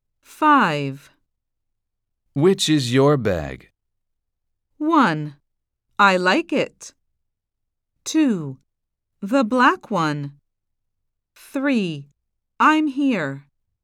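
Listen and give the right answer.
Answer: 2: The black one.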